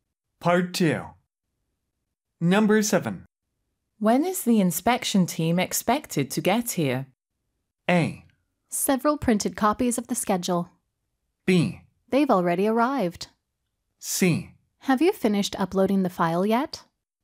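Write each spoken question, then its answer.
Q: When is the inspection team expected to get here?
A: B: They've already arrived.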